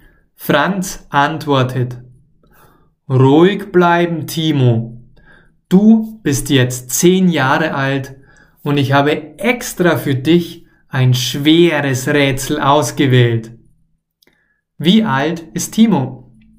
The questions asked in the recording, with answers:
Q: Wie alt ist Timo?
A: Er ist 10 Jahre alt.